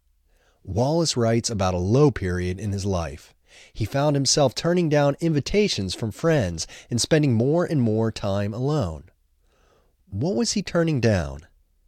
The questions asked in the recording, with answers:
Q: What was he turning down?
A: He was turning down invitations from friends.